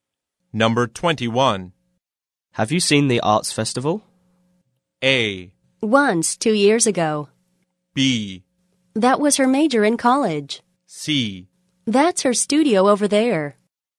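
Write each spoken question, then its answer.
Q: Have you seen the arts festival?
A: A: Once, 2 years ago.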